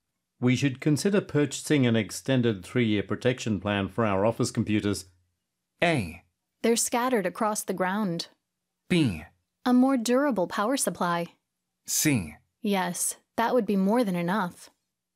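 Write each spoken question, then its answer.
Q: We should consider purchasing an extended three-year protection plan for our office computers.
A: C: Yes, that would be more than enough.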